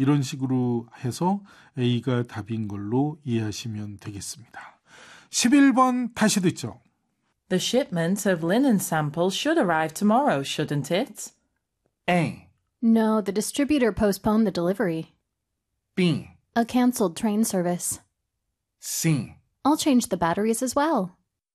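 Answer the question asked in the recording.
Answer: A: No, the distributor postponed the delivery.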